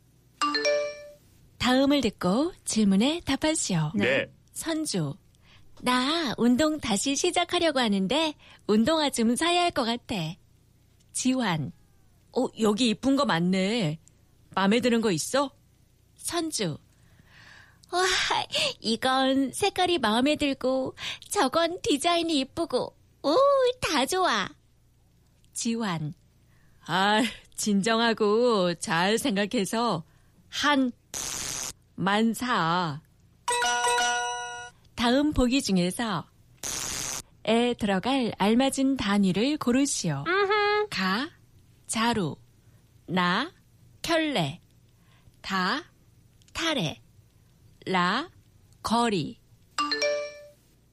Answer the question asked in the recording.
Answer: Na, kyole. Pair of shoes.